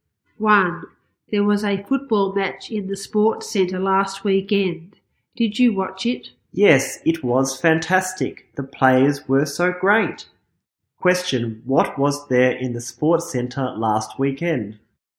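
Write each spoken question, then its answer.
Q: Question, what was there in the sports center last weekend?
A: A football match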